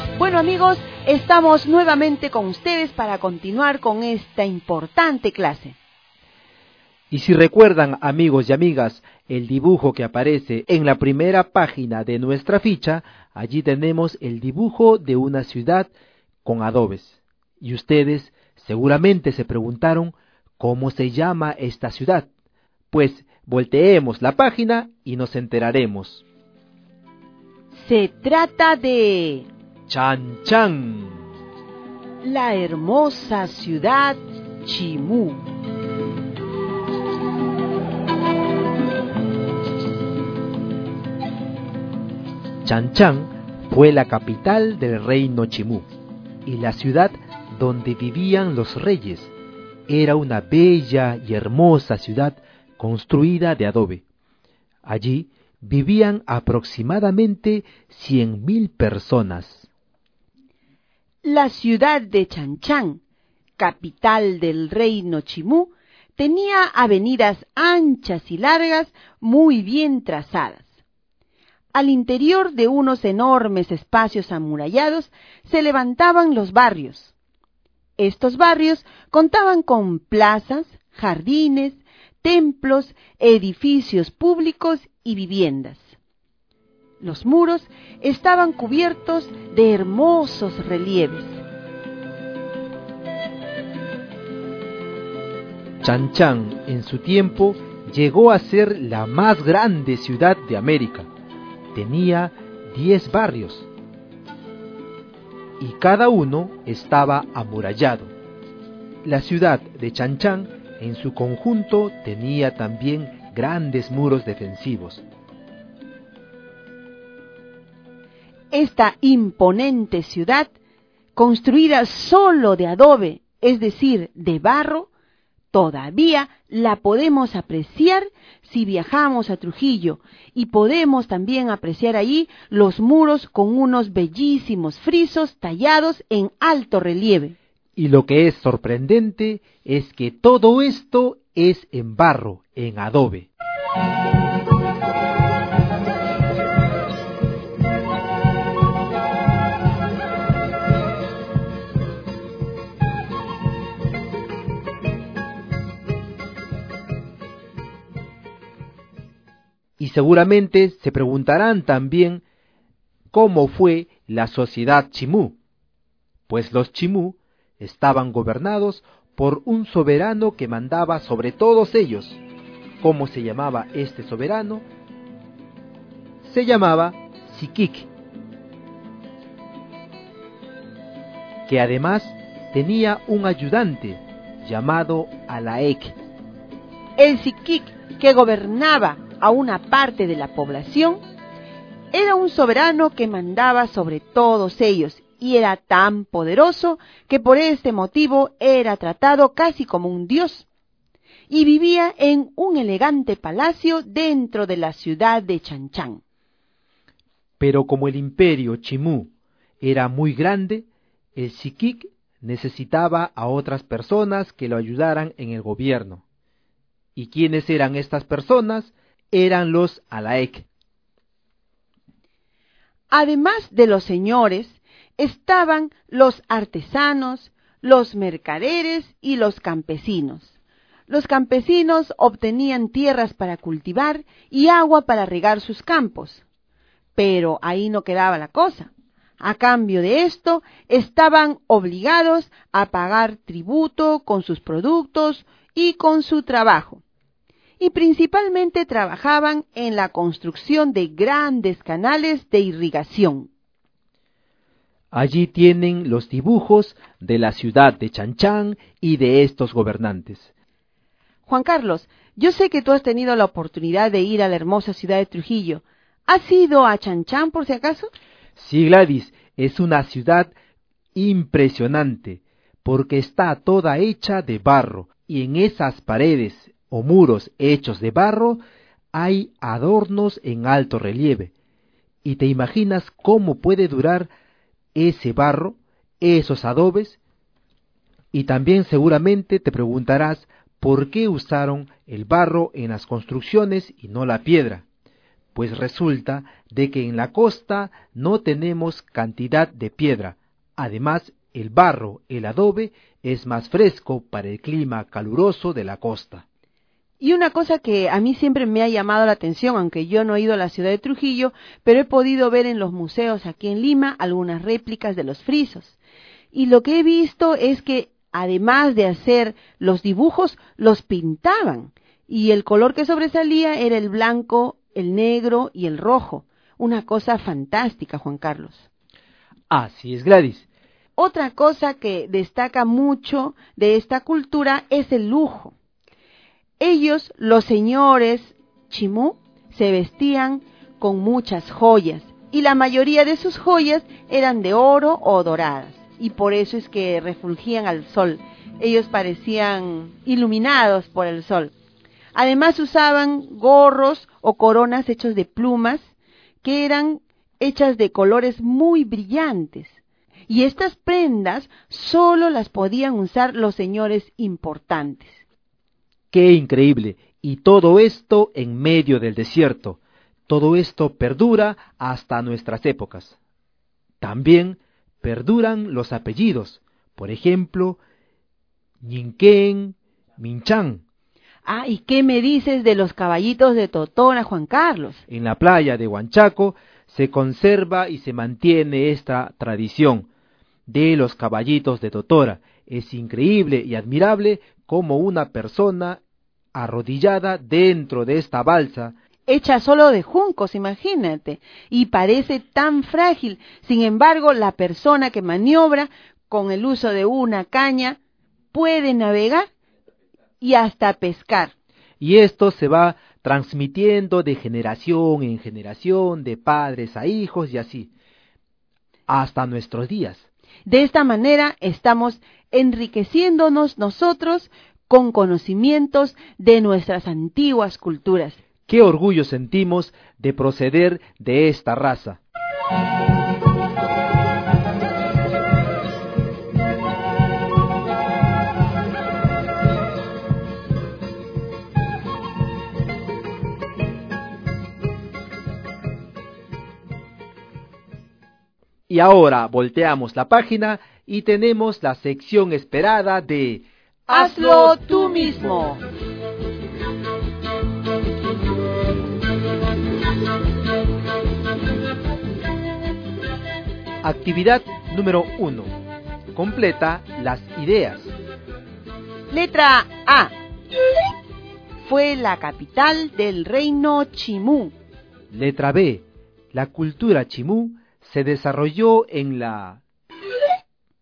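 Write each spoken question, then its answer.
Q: Letra A. Fue la capital del reino Chimú.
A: Chan Chan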